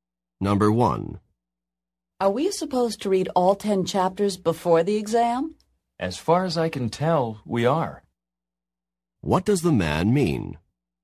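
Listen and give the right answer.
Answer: He thinks they have to read all 10 chapters.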